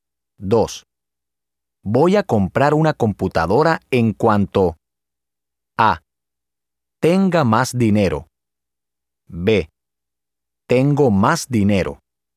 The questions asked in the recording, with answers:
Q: Voy a comprar una computadora en cuanto A. Tenga más dinero. B. Tengo más dinero.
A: A. Voy a comprar una computadora en cuanto tenga más dinero.